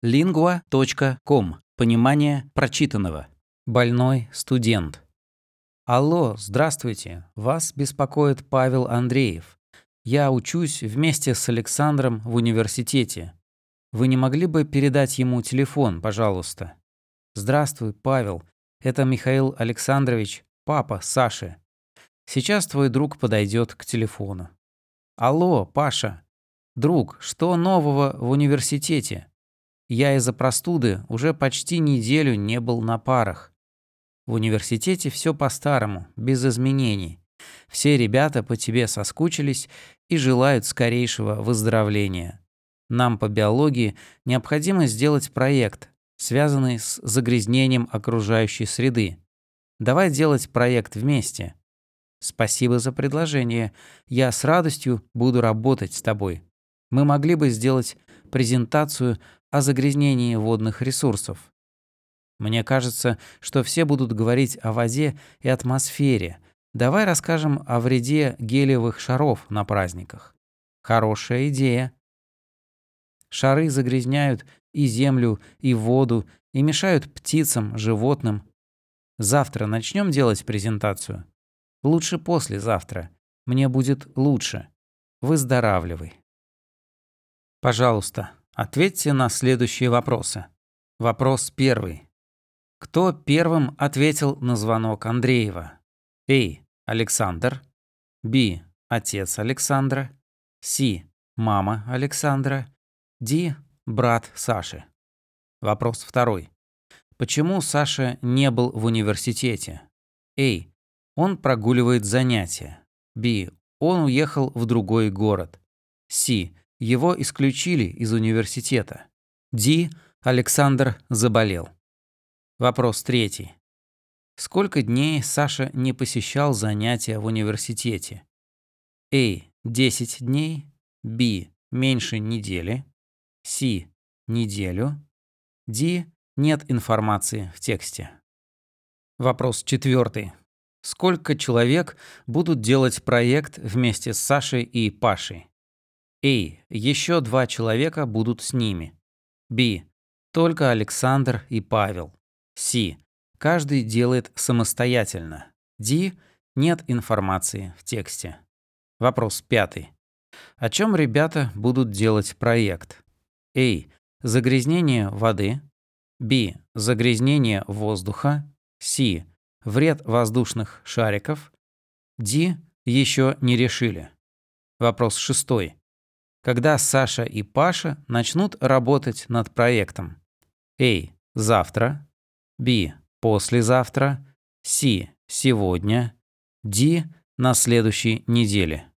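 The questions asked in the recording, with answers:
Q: Кто первым ответил на звонок Андреева?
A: Б: Отец Александра

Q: Почему Саша не был в университете?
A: Д: Александр заболел

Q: Сколько дней Саша не посещал занятия в университете?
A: Б: Меньше недели

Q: Сколько человек будут делать проект вместе с Сашей и Пашей?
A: Б: Только Александр и Павел

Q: О чем ребята будут делать проект?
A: С: Вред воздушных шариков

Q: Когда Саша и Паша начнут работать над проектом?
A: Б: Послезавтра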